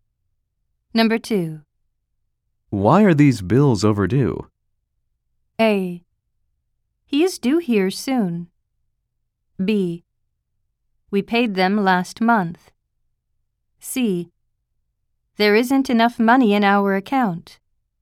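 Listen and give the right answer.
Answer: C: There isn't enough money in our account.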